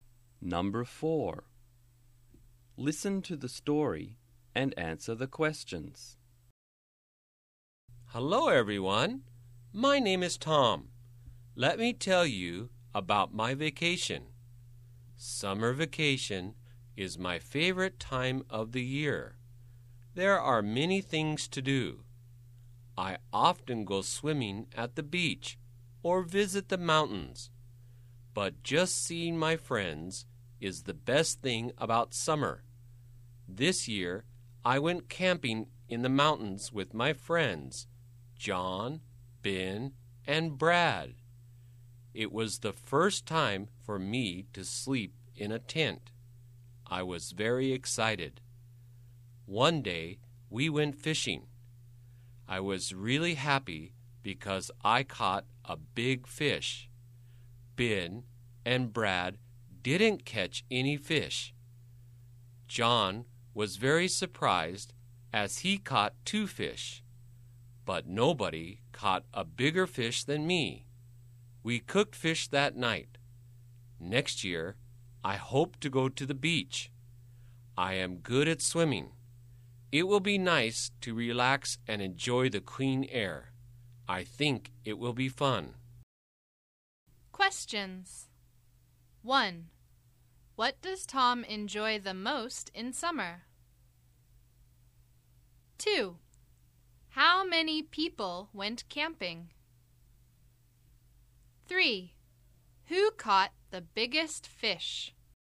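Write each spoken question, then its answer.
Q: What does Tom enjoy the most in summer?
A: Seeing his friends

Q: How many people went camping?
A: Four

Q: Who caught the biggest fish?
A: Tom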